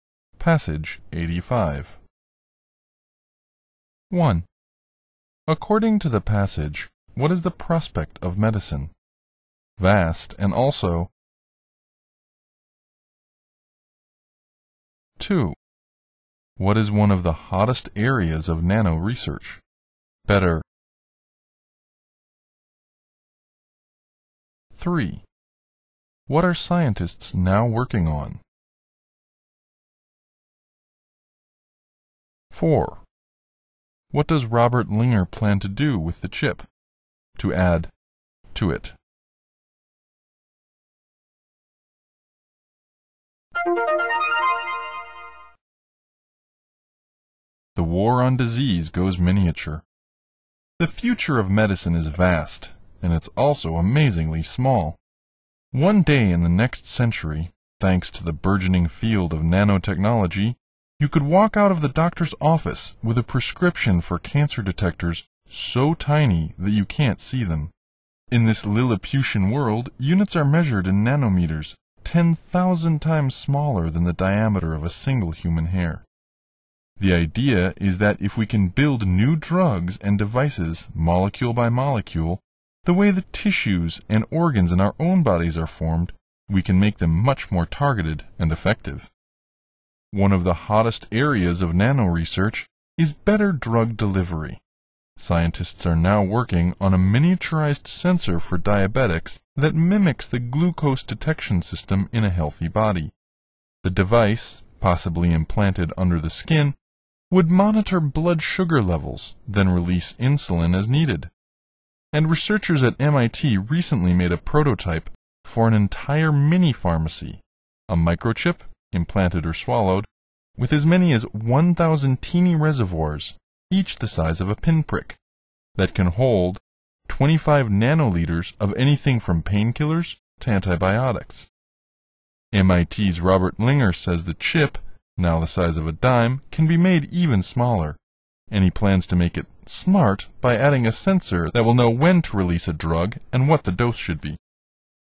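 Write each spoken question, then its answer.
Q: According to the passage, what is the prospect of medicine?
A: Vast, and also amazingly small

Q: What is one of the hottest areas of nano research?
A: Better drug delivery

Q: What are scientists now working on?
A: A miniaturized sensor for diabetics that mimics the glucose detection system in a healthy body

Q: What does Robert Linger plan to do with the chip?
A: Make it smart by adding a sensor that knows when to release a drug and what the dose should be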